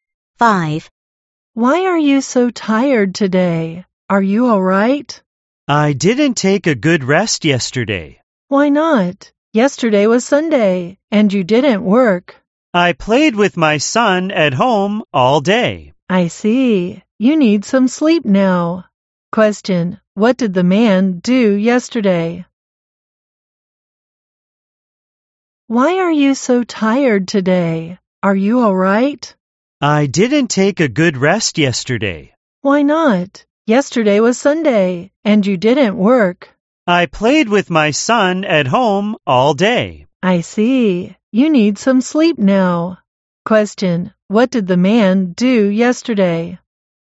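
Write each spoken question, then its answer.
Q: Question, what did the man do yesterday?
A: He played with his son at home all day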